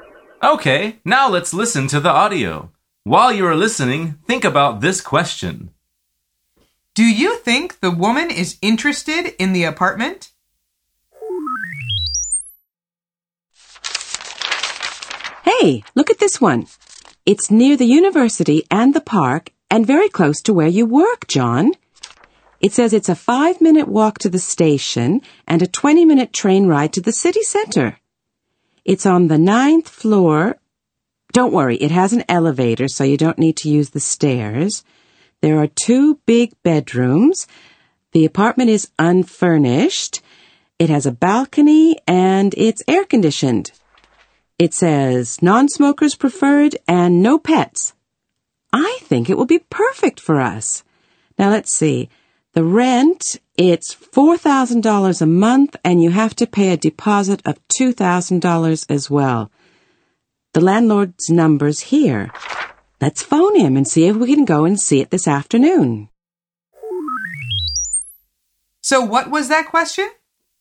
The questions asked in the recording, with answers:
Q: Do you think the woman is interested in the apartment?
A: The answer is yes, she is.